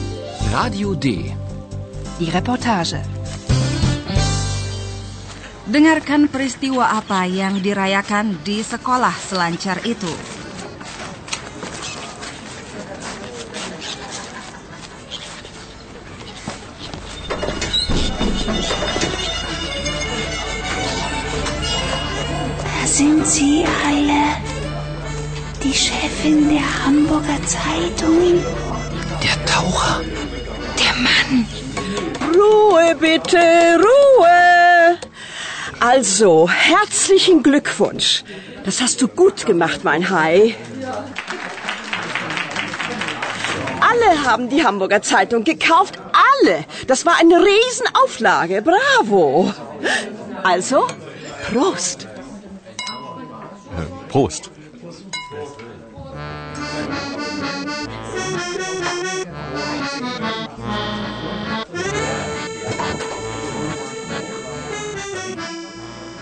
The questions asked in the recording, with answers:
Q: Dengarkan peristiwa apa yang dirayakan di sekolah selancar itu.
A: Bayangkan penipuan yang dirayakan di situ.